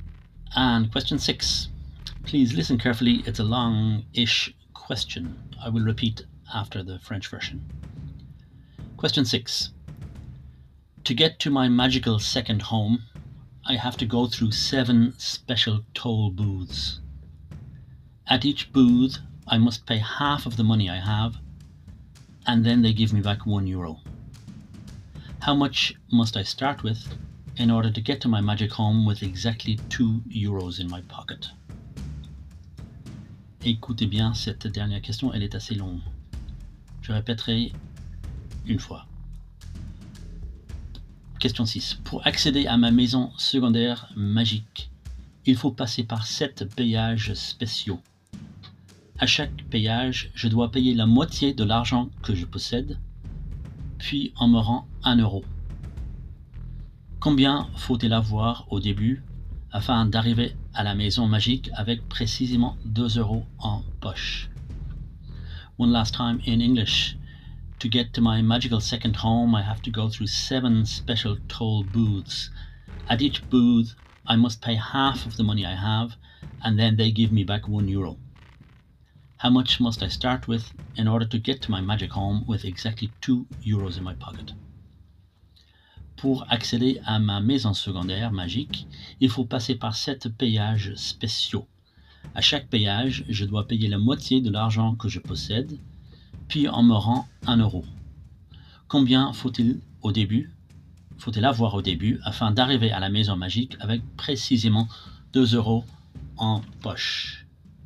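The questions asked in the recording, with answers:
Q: How much must I start with in order to get to my magic home with exactly 2 euros in my pocket?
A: 2 euros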